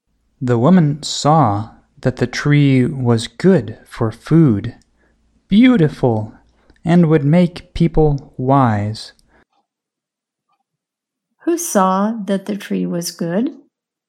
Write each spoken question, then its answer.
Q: Who saw that the tree was good?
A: The woman saw that the tree was good.